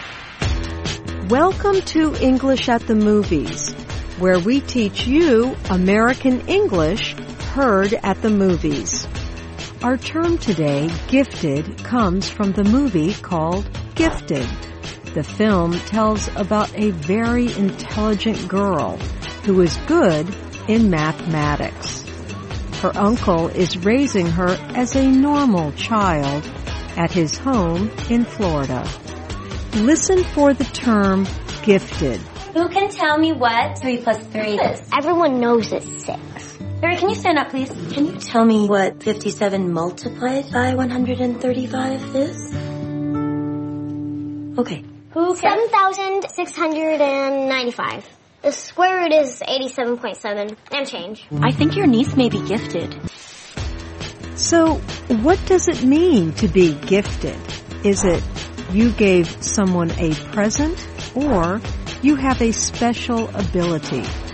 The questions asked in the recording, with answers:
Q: So, what does it mean to be gifted? Is it you gave someone a present or you have a special ability.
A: Gifted means you have a special ability.